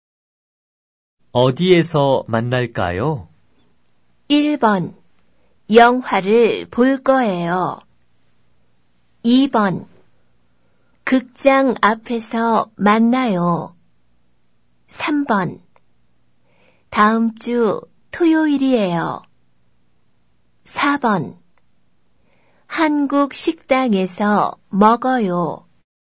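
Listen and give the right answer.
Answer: 2: 극장 앞에서 만나요.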